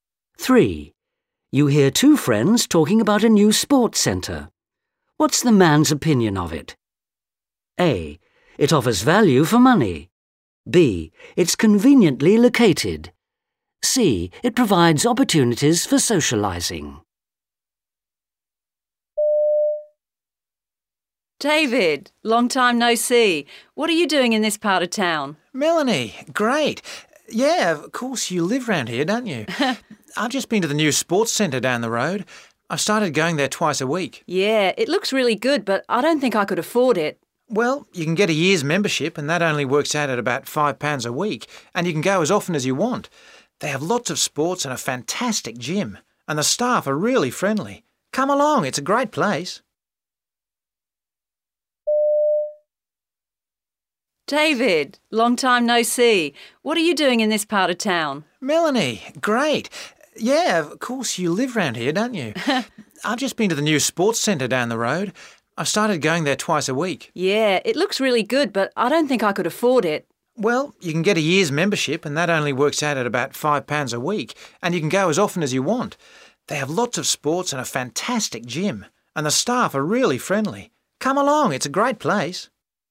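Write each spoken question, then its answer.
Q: What's the man's opinion of it?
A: A: It offers value for money.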